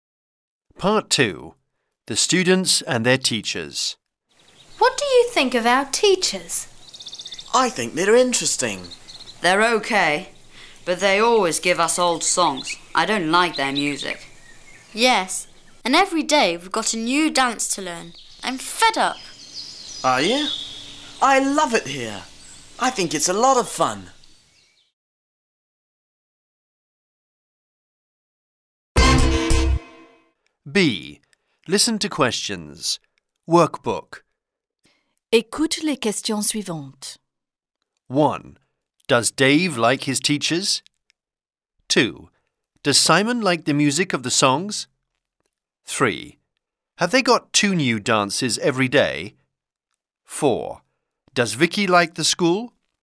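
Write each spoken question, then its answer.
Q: Have they got 2 new dances every day?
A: No, they've got one new dance every day.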